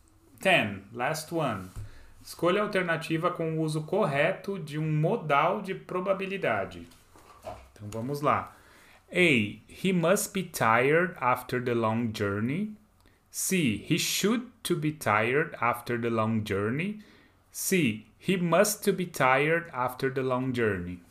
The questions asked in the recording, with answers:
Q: Escolha a alternativa com o uso correto de um modal de probabilidade.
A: Hum, letter A. He must be tired after the long journey.